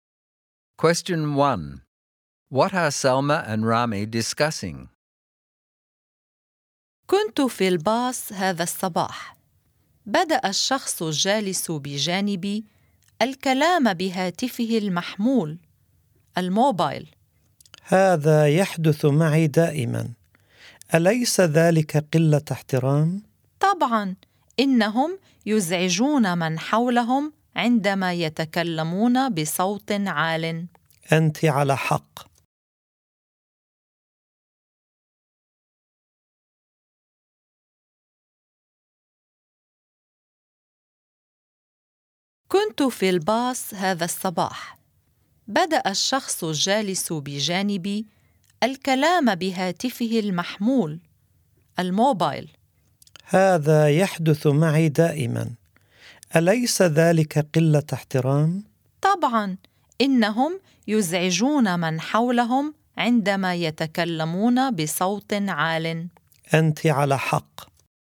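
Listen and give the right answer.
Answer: People talking loudly on mobile phones on the bus, which is disrespectful and annoying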